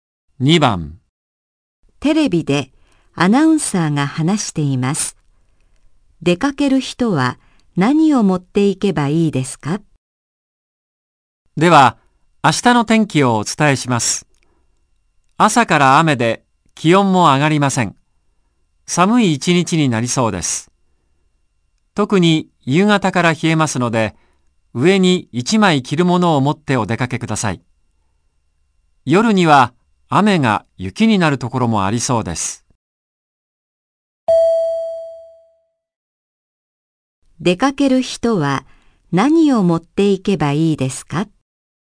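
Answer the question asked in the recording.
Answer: 上に1枚着るもの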